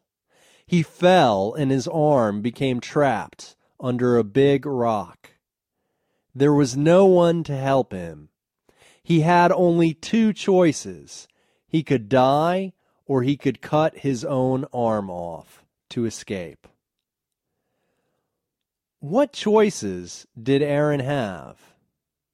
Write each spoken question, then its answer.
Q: What choices did Aaron have?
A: He could die or he could cut his arm off.